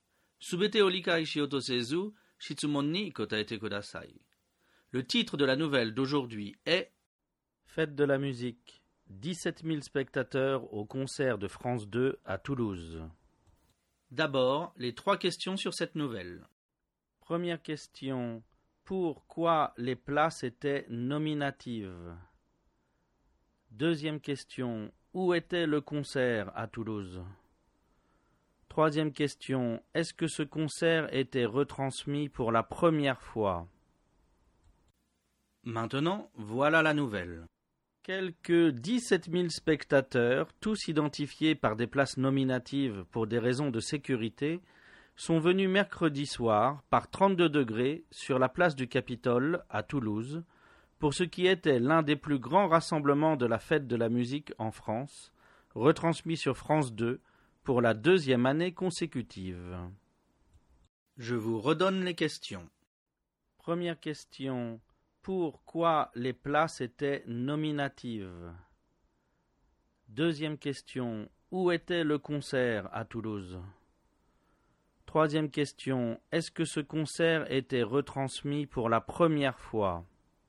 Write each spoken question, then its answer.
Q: Pourquoi les places étaient nominatives?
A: Les places étaient nominatives pour des raisons de sécurité.

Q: où était le concert à Toulouse?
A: Le concert était sur la place du Capitole.

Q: est-ce que ce concert était retransmis pour la première fois?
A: Non, ce concert était retransmis pour la deuxième année consécutive.